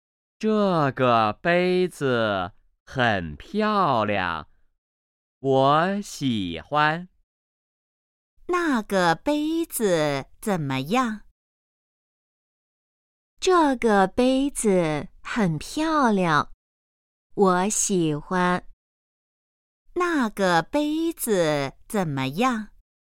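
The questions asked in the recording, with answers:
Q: 那个杯子怎么样?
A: 很漂亮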